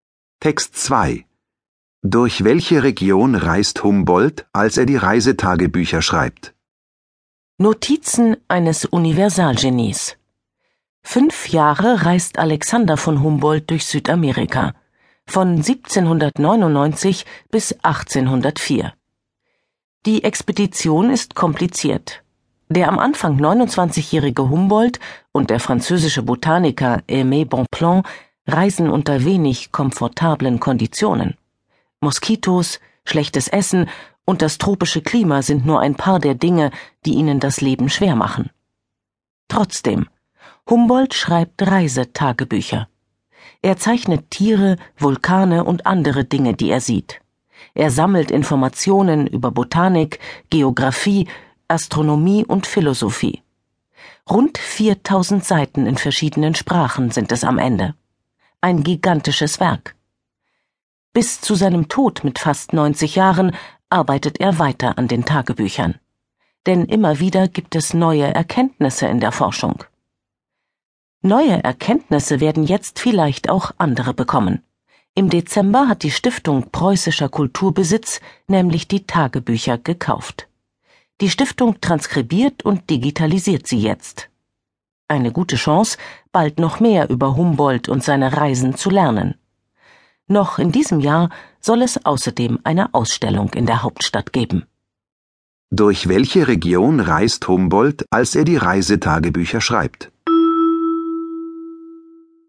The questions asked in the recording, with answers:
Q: Durch welche Region reist Humboldt, als er die Reisetagebücher schreibt?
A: Er reist durch Südamerika.